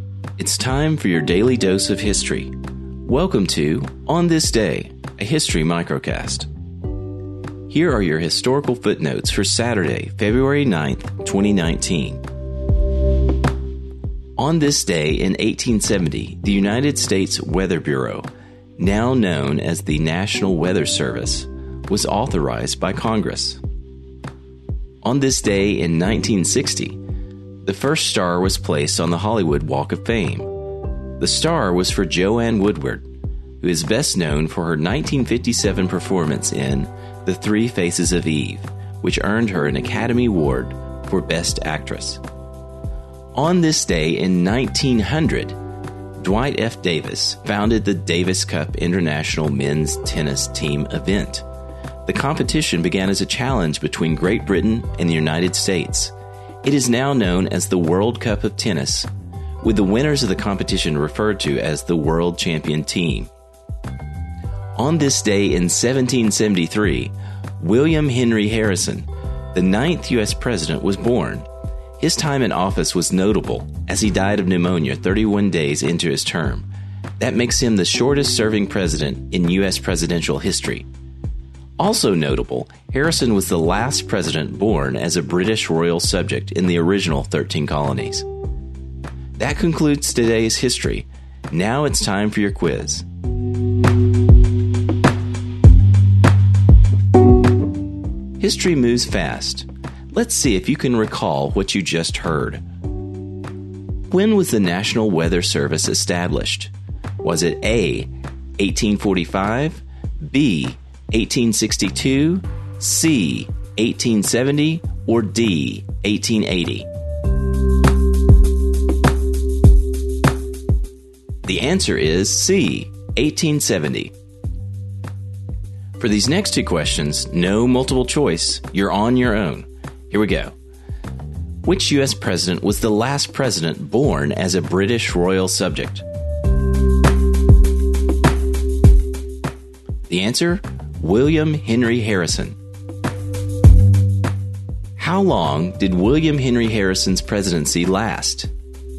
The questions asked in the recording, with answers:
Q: When was the National Weather Service established?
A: The answer is C, 1870.

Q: How long did William Henry Harrison's presidency last?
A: The answer? 31 days.